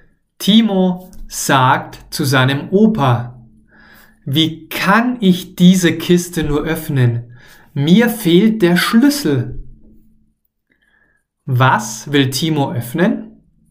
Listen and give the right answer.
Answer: Diese Kiste. Er will diese Kiste öffnen.